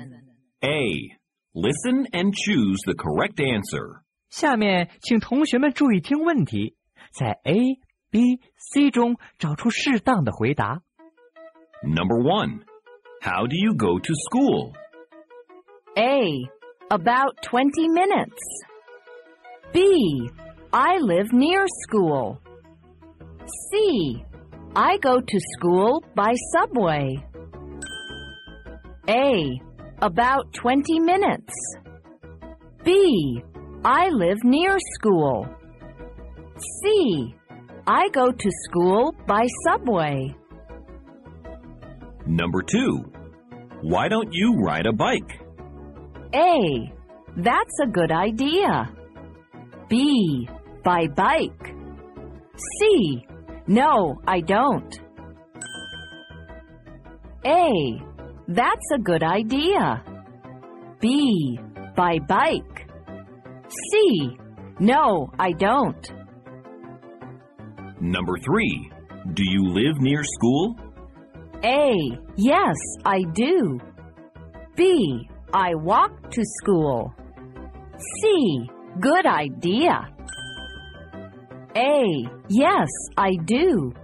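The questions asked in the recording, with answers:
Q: how do you go to school?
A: C: I go to school by subway.

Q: why don't you ride a bike?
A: A: that's a good idea.

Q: do you live near school?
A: A: yes, I do.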